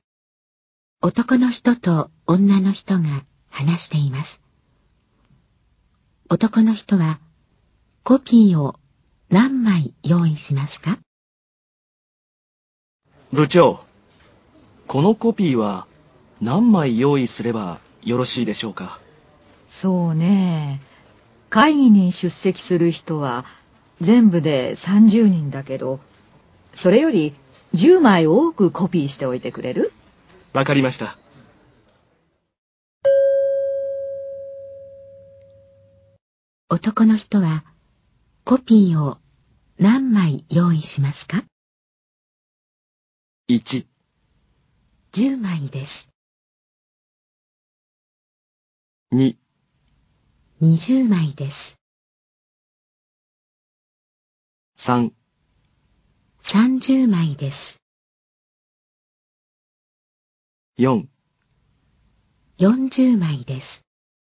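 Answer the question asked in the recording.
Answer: 4: 40枚です。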